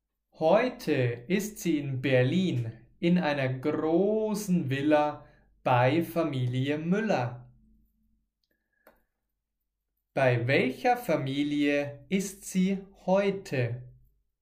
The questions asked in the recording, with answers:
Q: Bei welcher Familie ist sie heute?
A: Bei Familie Müller. Sie ist heute bei Familie Müller.